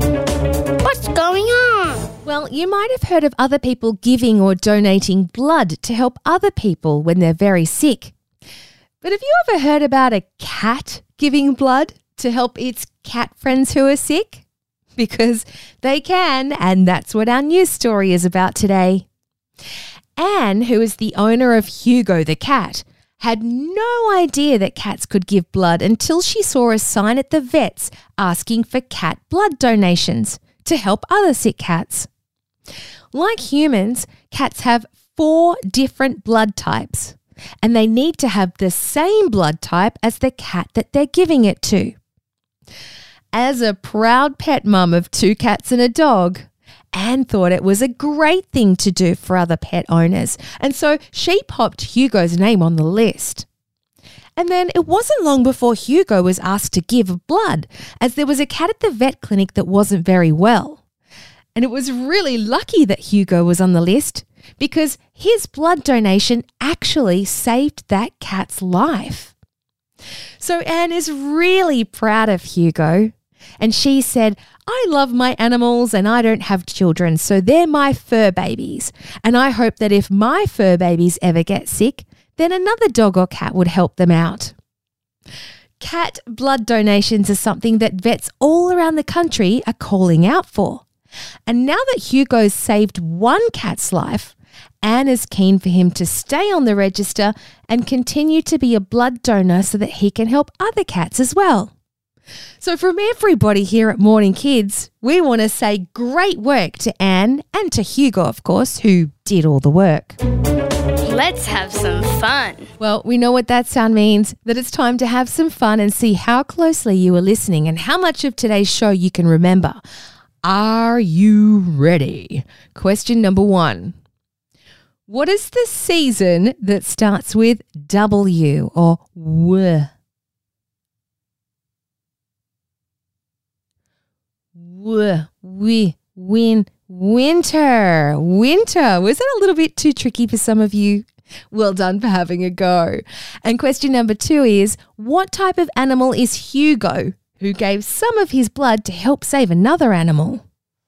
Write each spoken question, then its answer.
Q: what type of animal is Hugo, who gave some of his blood to help save another animal?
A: You got it. Hugo's a cat.